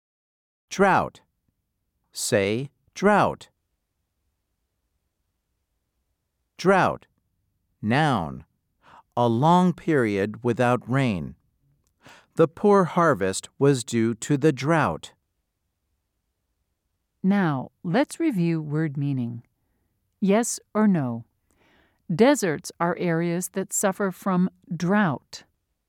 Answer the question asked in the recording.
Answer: If you said yes, you are right.